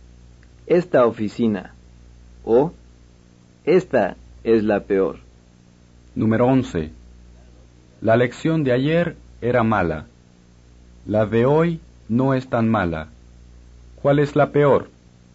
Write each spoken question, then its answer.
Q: ¿Cuál es la peor?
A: La lección de ayer. O, la de ayer es la peor.